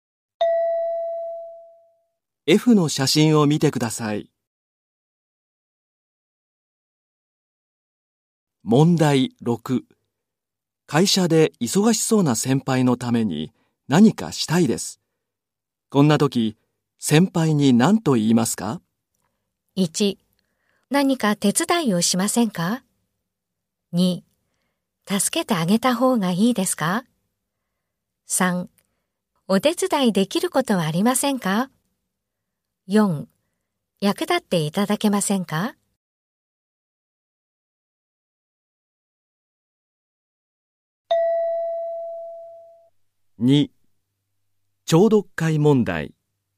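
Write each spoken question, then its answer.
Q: 会社で忙しそうな先輩のために何かしたいです。こんな時、先輩に何と言いますか?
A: 1: お手伝いできることはありませんか?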